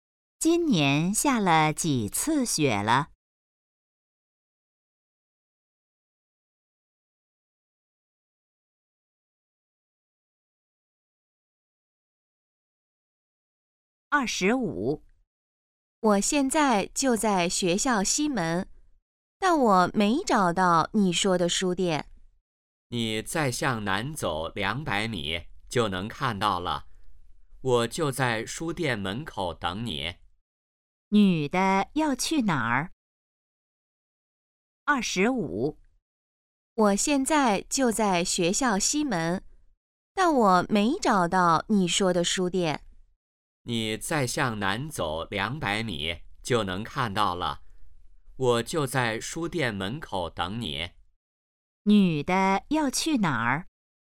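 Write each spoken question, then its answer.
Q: 女的要去哪儿?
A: 书店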